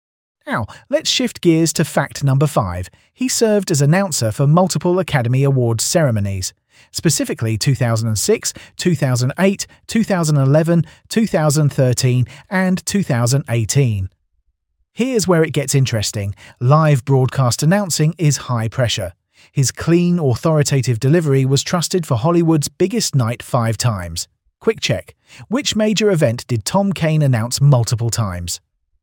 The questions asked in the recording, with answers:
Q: Which major event did Tom Kane announce multiple times?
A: Correct answer. The Academy Awards.